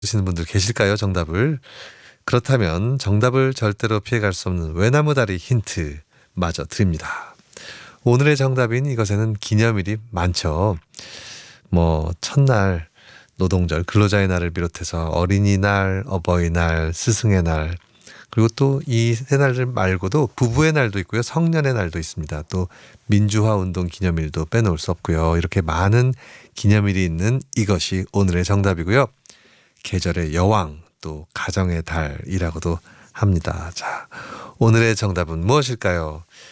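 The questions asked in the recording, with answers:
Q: 자, 오늘의 정답은 무엇일까요?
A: 5월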